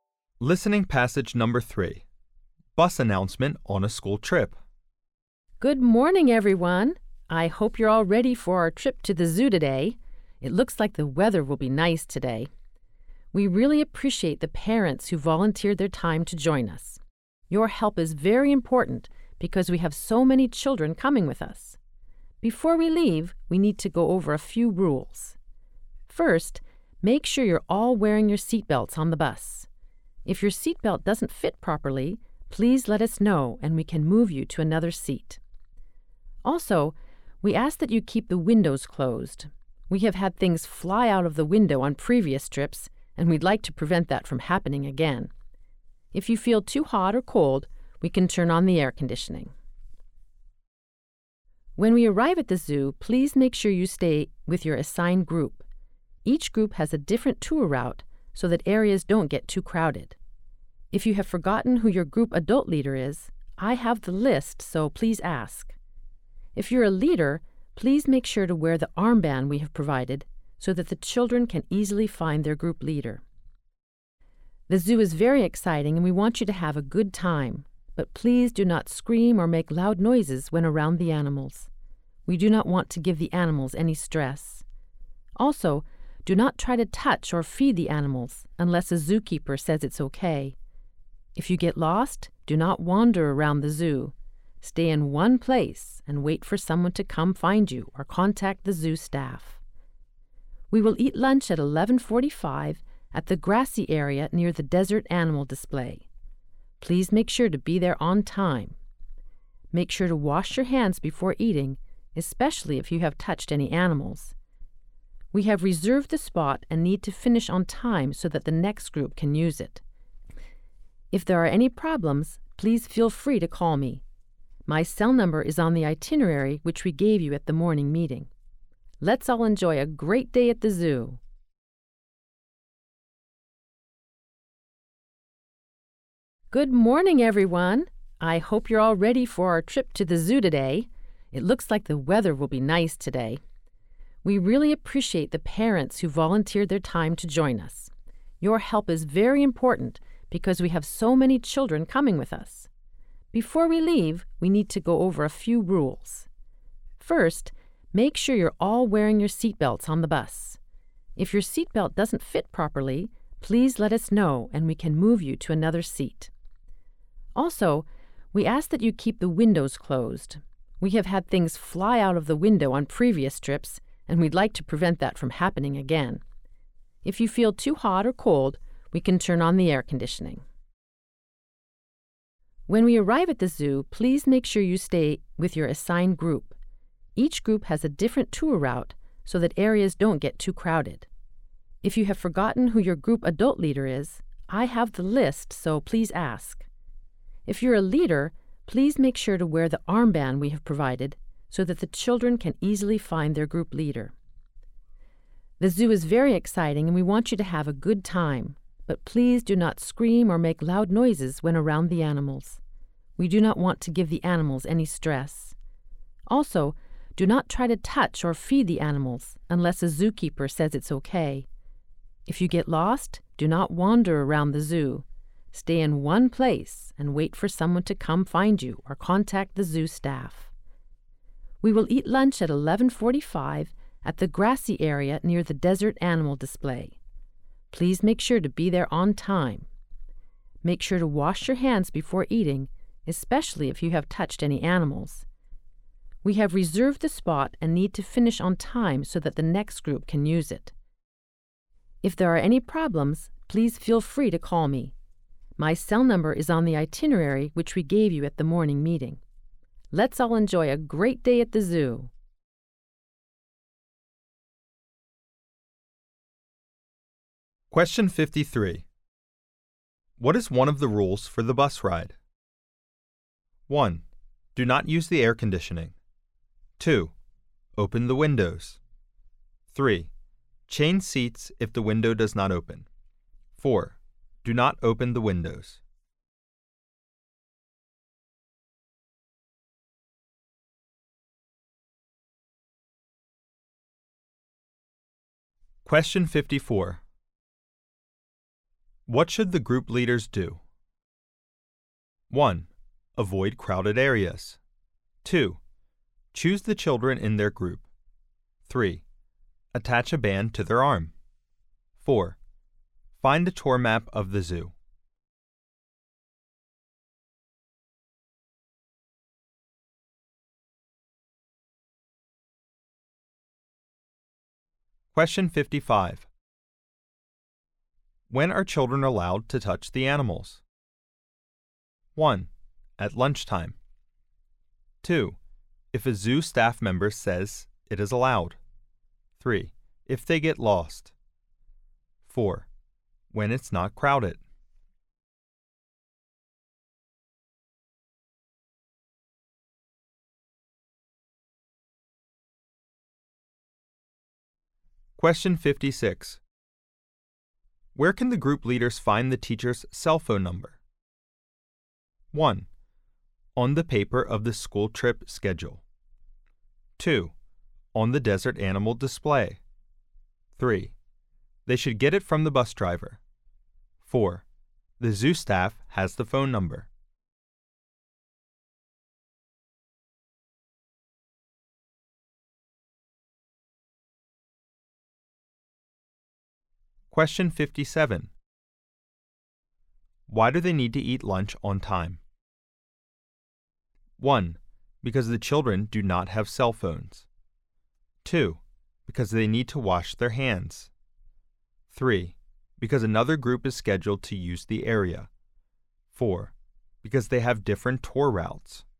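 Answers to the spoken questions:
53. 4: Do not open the windows.
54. 3: Attach a band to their arm.
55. 2: If a zoo staff member says it is allowed.
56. 1: On the paper of the school trip schedule.
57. 3: Because another group is scheduled to use the area.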